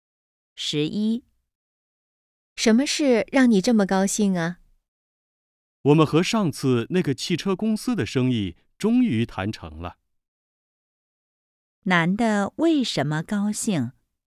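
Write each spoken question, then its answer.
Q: 男的为什么高兴?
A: 和汽车公司的生意谈成了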